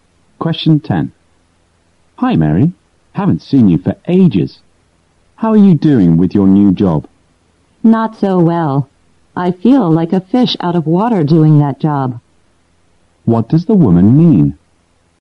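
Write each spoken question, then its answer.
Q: What does the woman mean?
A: She feels uncomfortable and out of place in her new job.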